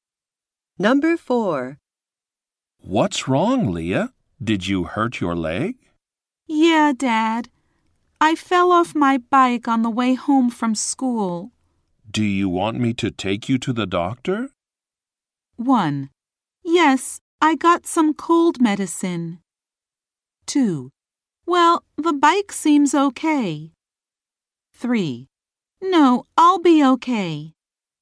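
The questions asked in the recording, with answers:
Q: Do you want me to take you to the doctor?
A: 3: No, I'll be okay.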